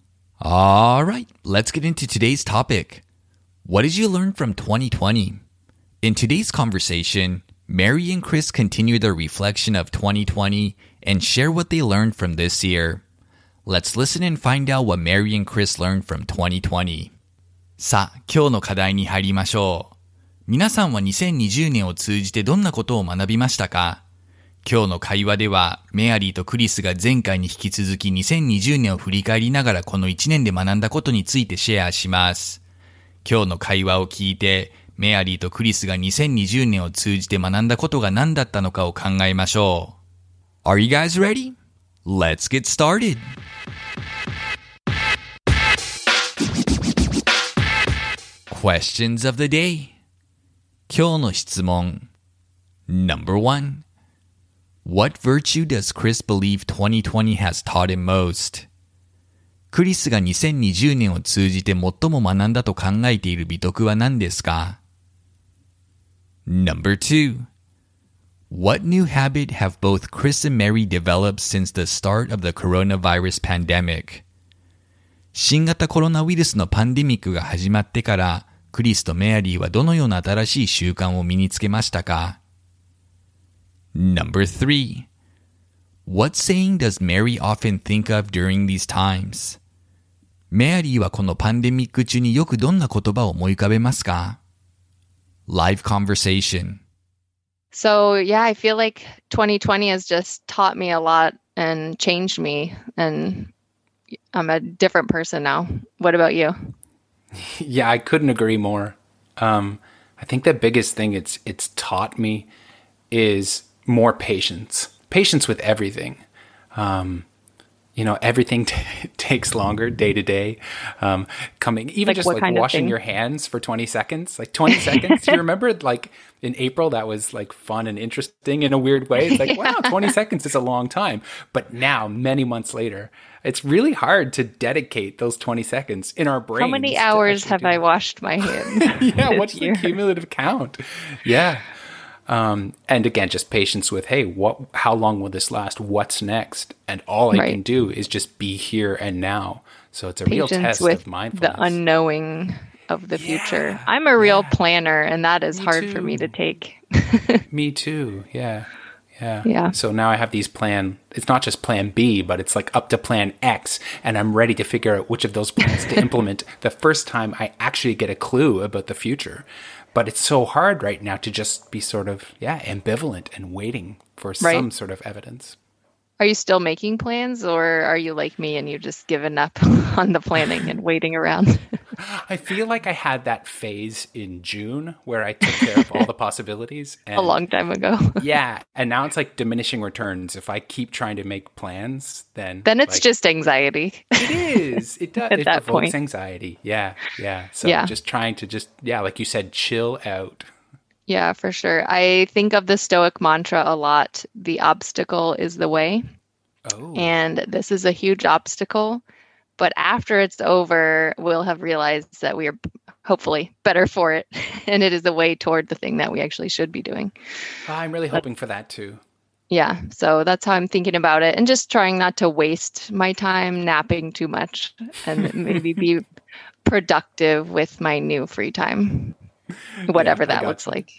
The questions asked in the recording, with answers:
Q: What virtue does Chris believe 2020 has taught him most?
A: He feels 2020 has taught him patience and to be more patient with life's difficulties.

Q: What new habit have both Chris and Mary developed since the start of the coronavirus pandemic?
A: Both have now gotten used to washing their hands for 20 seconds at a time.

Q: What saying does Mary often think of during these times?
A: She often recalls a Stoic mantra that says, "The obstacle is the way."